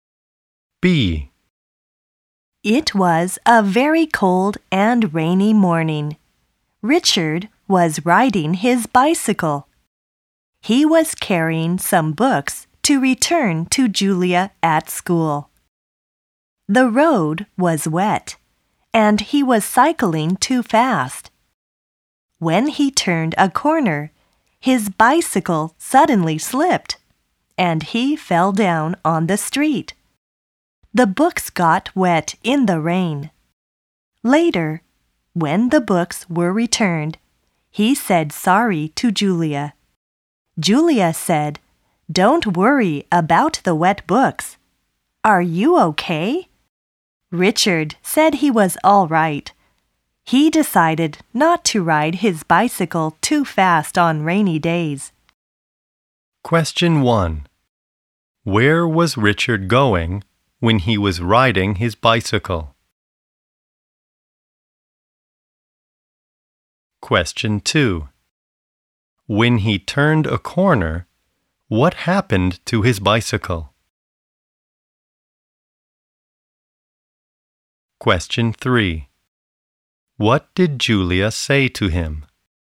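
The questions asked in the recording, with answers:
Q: Where was Richard going when he was riding his bicycle?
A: To school

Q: When he turned a corner, what happened to his bicycle?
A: It suddenly slipped

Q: What did Julia say to him?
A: Don't worry about the wet books. Are you okay?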